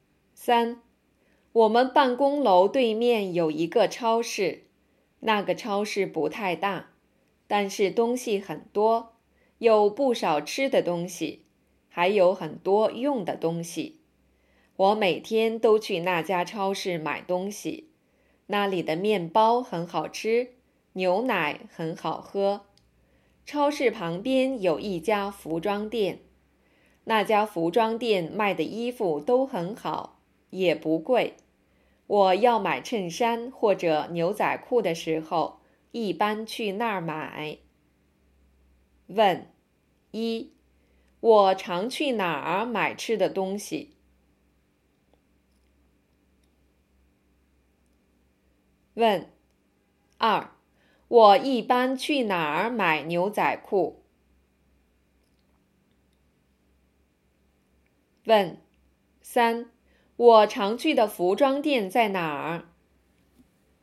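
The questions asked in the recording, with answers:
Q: 我常去哪儿买吃的东西?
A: 办公楼对面的超市

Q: 我一般去哪儿买牛仔裤?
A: 超市旁边的服装店

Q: 我常去的服装店在哪儿?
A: 超市旁边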